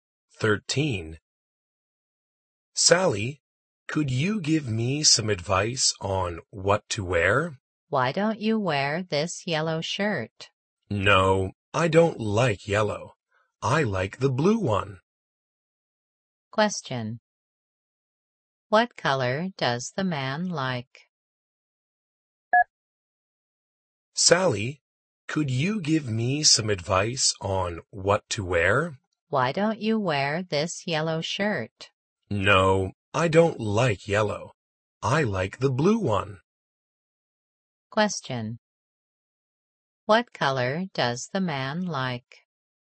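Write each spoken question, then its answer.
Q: What color does the man like?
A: Blue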